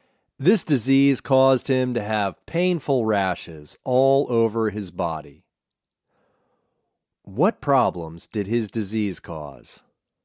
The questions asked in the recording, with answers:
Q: What problems did his disease cause?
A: The disease caused him to have painful rashes all over his body.